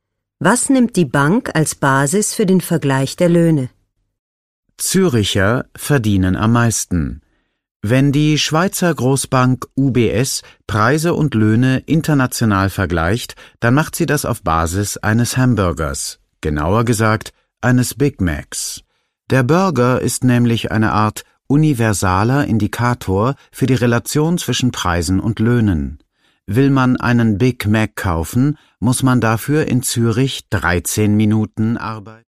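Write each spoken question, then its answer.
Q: Was nimmt die Bank als Basis für den Vergleich der Löhne?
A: Einen Hamburger (Big Mac)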